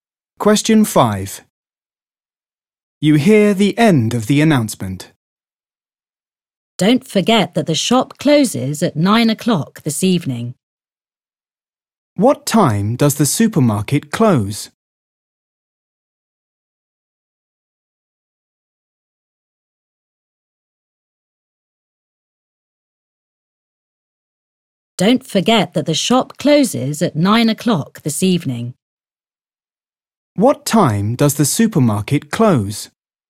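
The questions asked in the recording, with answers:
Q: What time does the supermarket close?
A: 9 o'clock this evening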